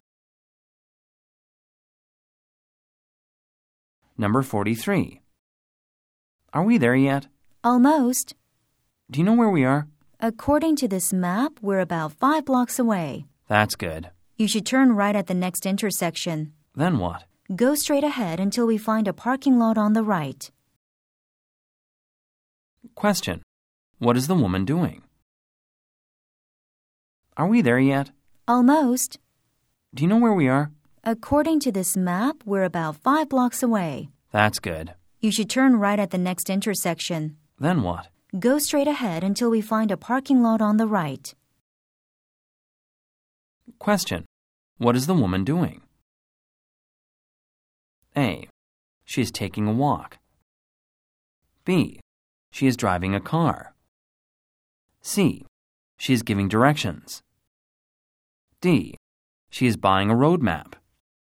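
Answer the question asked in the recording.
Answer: C: She is giving directions.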